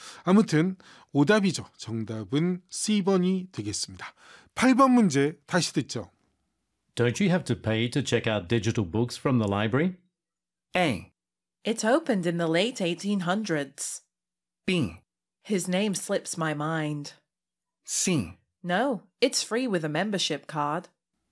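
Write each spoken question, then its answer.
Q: Don't you have to pay to check out digital books from the library?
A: C: No, it's free with a membership card.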